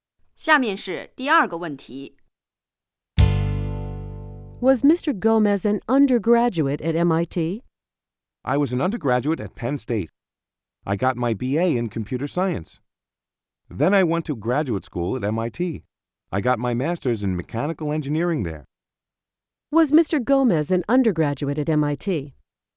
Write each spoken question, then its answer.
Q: Was Mr. Gomez an undergraduate at MIT?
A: No, he wasn't. He went to graduate school at MIT.